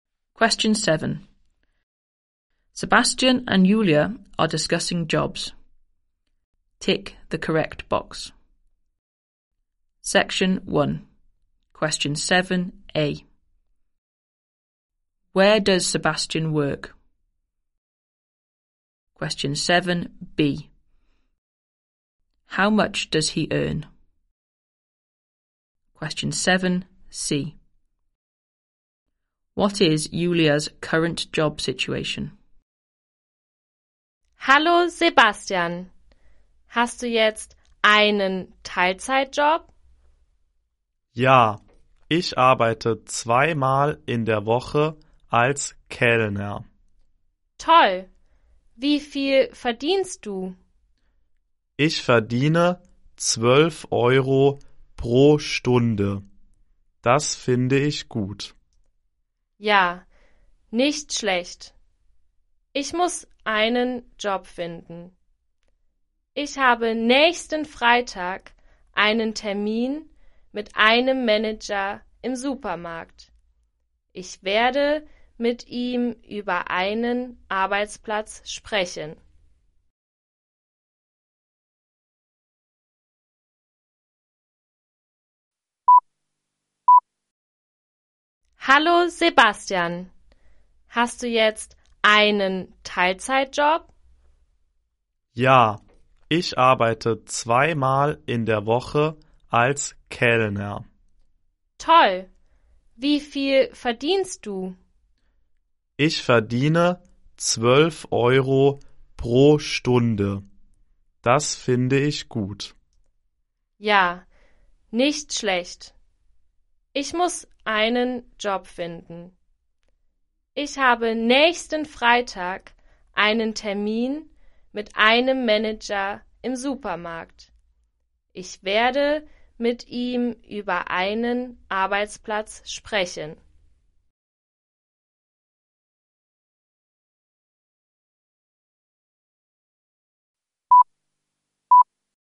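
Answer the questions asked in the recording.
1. As a waiter (in a restaurant)
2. 12 euros per hour
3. She has no job; she has an appointment with a supermarket manager next Friday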